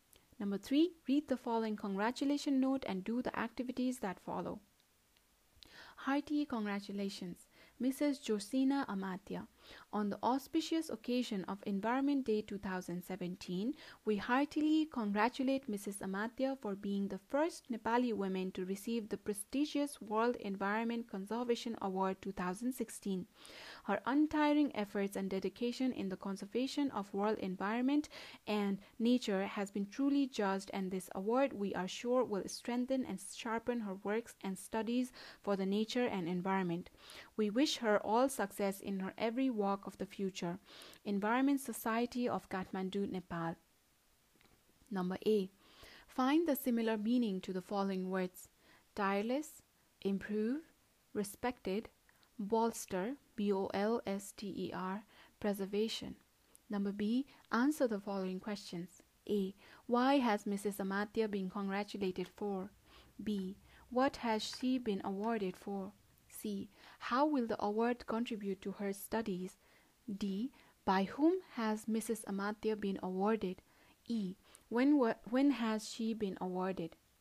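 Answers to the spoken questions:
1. For being the first Nepali woman to receive the World Environment Conservation Award 2016
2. Her untiring efforts and dedication in the conservation of world environment and nature
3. It will strengthen and sharpen her works and studies for nature and environment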